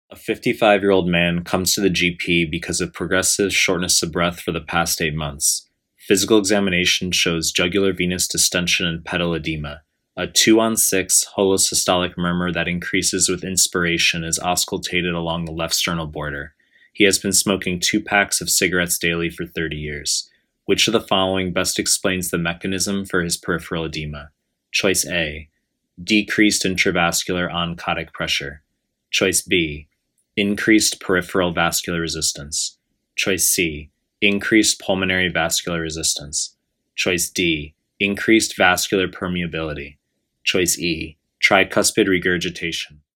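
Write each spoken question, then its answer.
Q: Which of the following best explains the mechanism for his peripheral edema?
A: C: increased pulmonary vascular resistance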